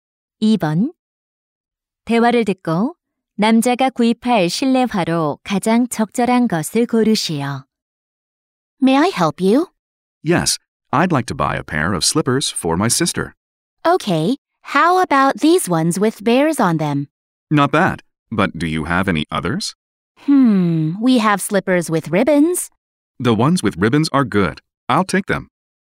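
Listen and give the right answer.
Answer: 리본이 달린 실내화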